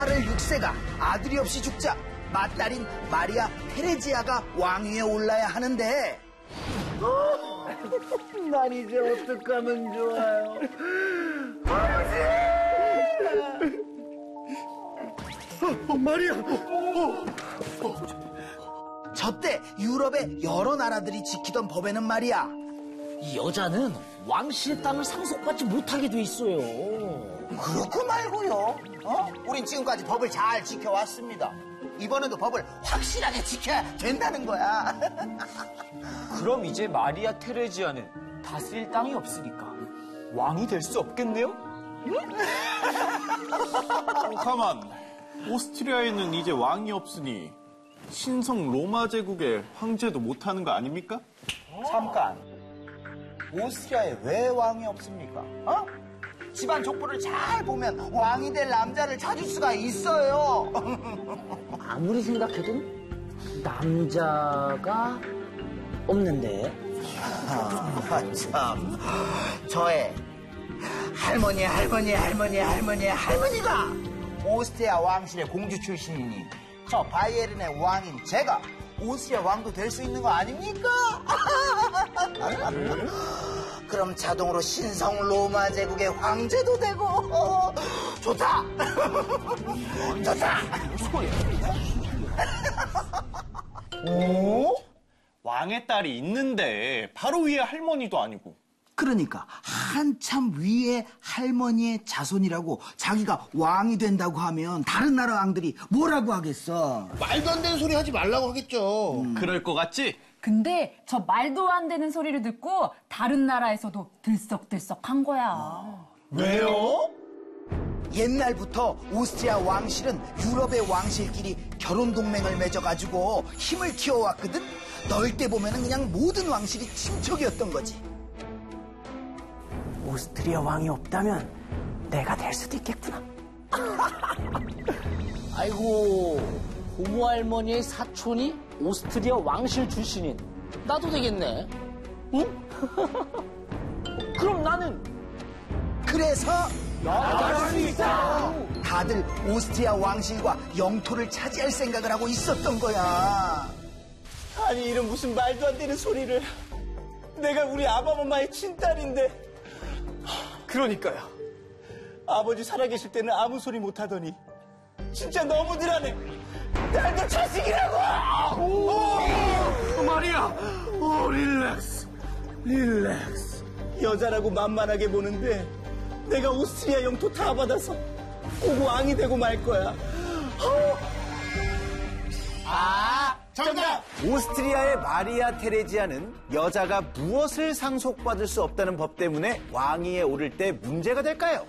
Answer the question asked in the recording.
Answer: 영토? 네, 정답 맞습니다!